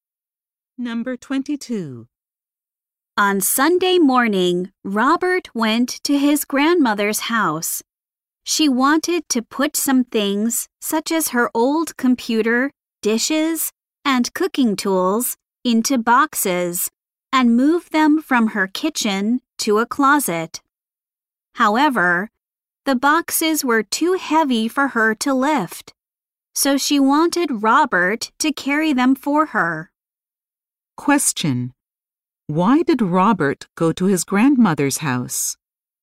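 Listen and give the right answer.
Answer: To carry heavy boxes for her.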